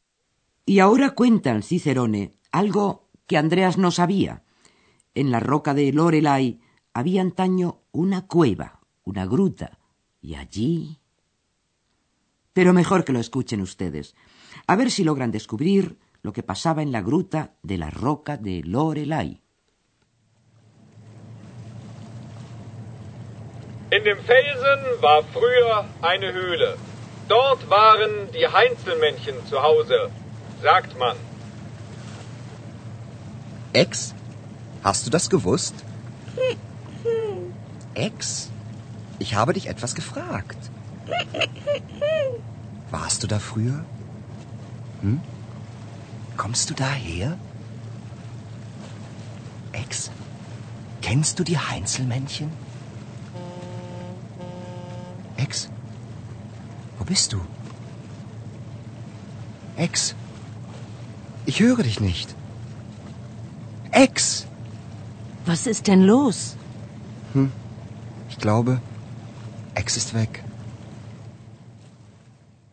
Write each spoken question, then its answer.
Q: a ver si logran descubrir lo que pasaba en la gruta de la roca de Lorelai.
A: Y aquella era la gruta donde habitaban los duendes, die Heinzelmännchen.